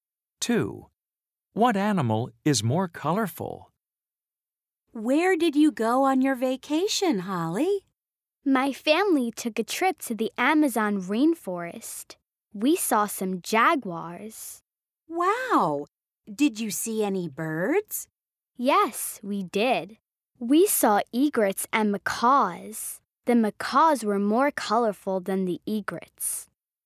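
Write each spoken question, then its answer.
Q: What animal is more colorful?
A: The macaws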